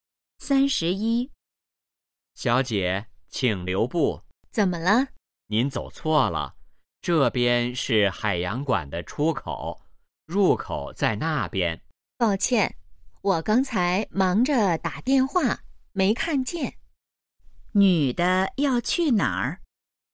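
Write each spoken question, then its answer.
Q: 女的要去哪儿?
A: 海洋馆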